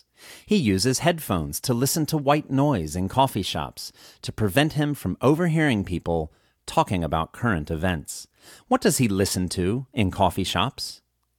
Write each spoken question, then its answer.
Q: What does he listen to in coffee shops?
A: He listens to white noise in coffee shops.